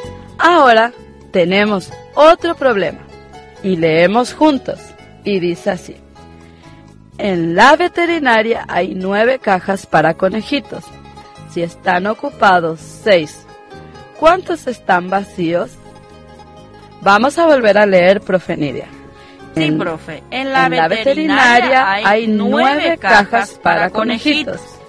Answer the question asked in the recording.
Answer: Es decir, que quedan 3 cajas vacías.